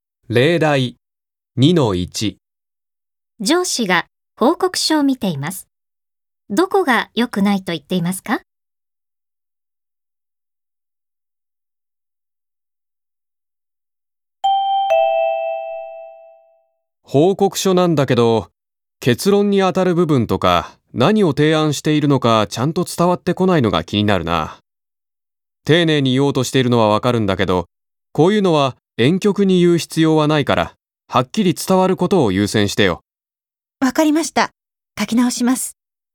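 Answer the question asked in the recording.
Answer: 結論や提案が婉曲すぎて、はっきり伝わらないところ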